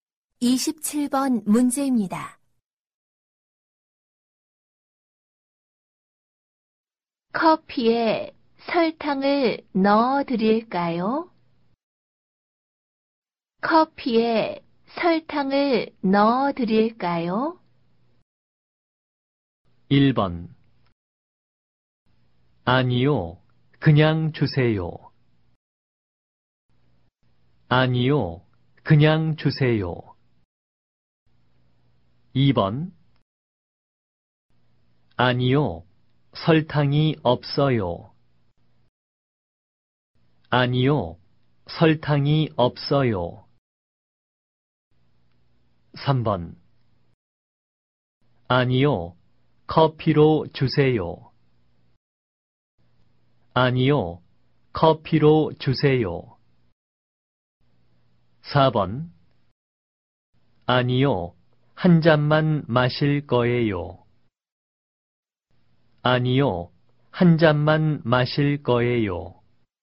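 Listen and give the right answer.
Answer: 1: 아니요, 그냥 주세요.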